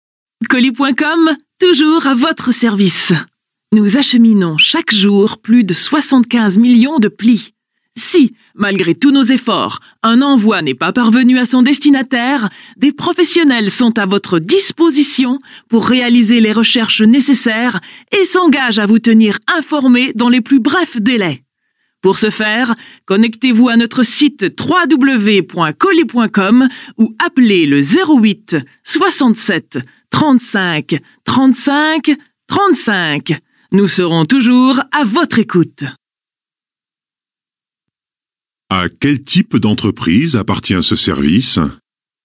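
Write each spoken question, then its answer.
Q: À quel type d'entreprise appartient ce service ?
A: Une entreprise de livraison de colis et de courrier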